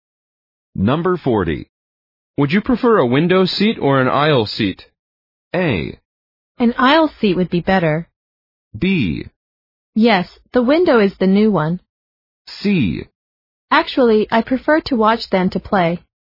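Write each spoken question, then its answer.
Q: Would you prefer a window seat or an aisle seat?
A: A: An aisle seat would be better.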